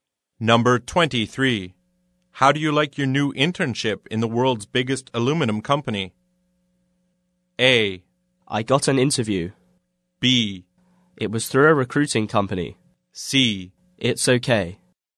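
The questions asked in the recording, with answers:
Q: How do you like your new internship in the world's biggest aluminum company?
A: C: It's okay.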